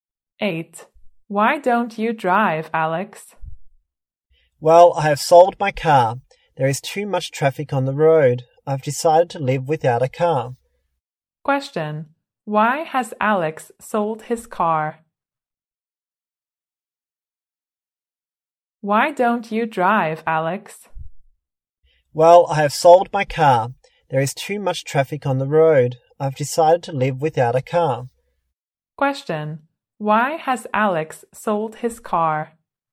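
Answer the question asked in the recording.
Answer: There is too much traffic on the road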